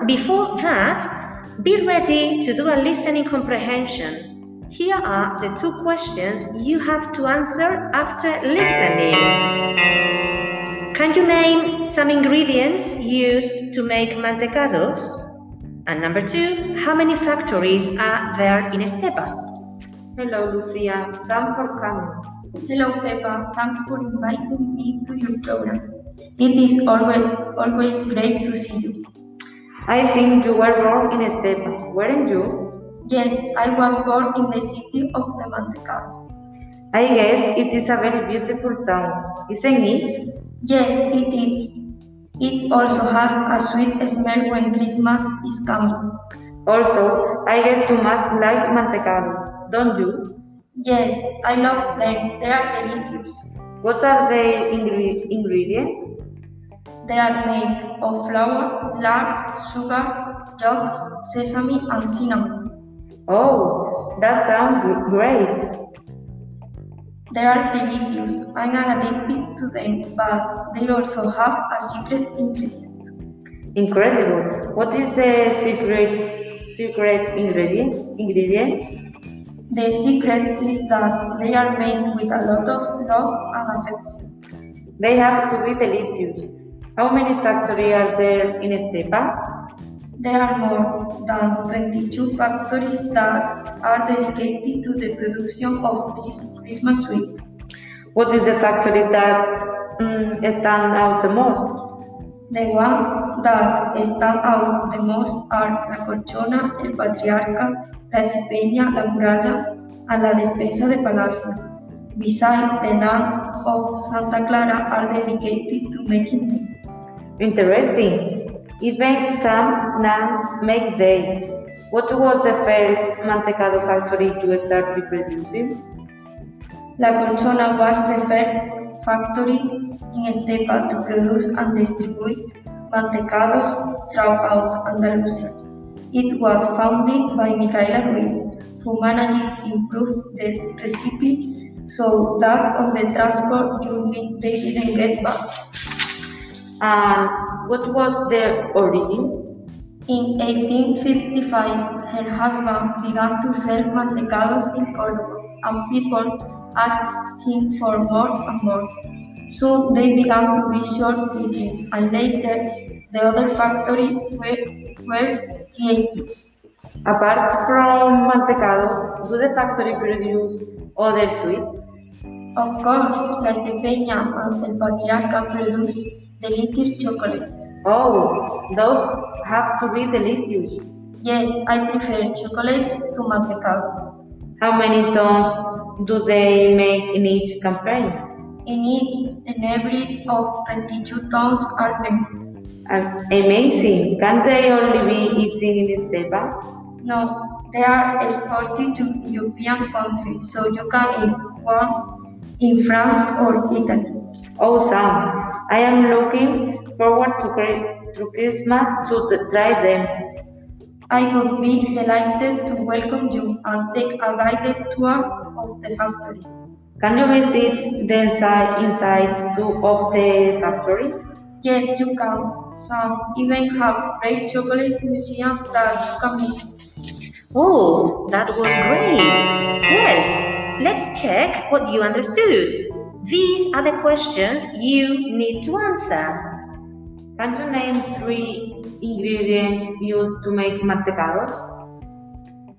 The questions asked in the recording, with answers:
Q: Can you name three ingredients used to make mantecados.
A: They are made of flour, lard, and sugar.